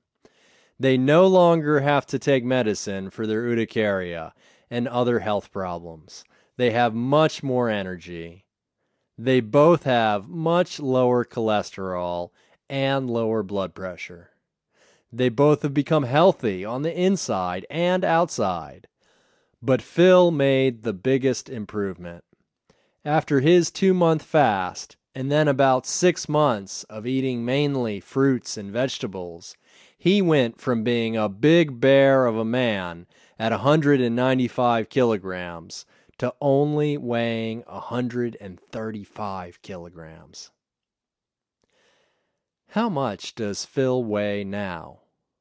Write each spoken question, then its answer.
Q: How much does Phil weigh now?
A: Phil weighs 135 kilograms.